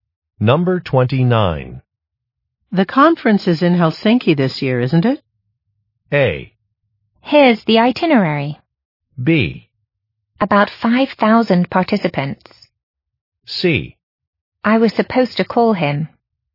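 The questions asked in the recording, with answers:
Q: The conference is in Helsinki this year, isn't it?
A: A: Here's the itinerary.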